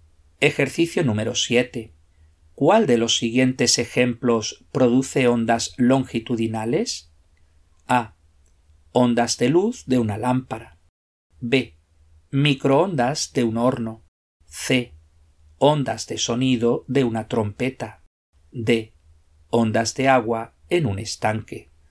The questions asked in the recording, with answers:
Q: ¿Cuál de los siguientes ejemplos produce ondas longitudinales?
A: La respuesta correcta es la C.